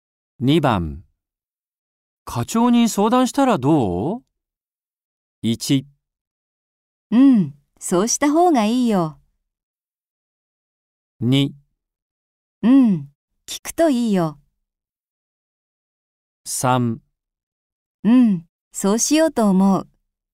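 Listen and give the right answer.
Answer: 3: うん、そうしようと思う。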